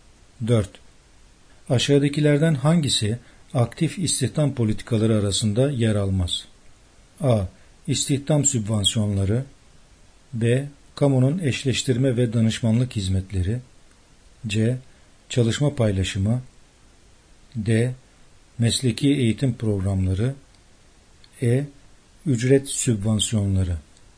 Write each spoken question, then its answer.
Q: Aşağıdakilerden hangisi aktif istihdam politikaları arasında yer almaz?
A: Yanıt C. Çalışma paylaşımı.